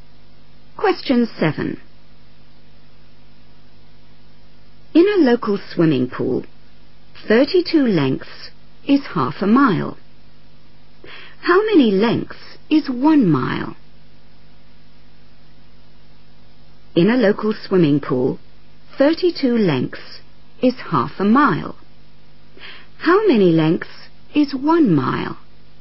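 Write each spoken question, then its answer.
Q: How many lengths is 1 mile?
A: 64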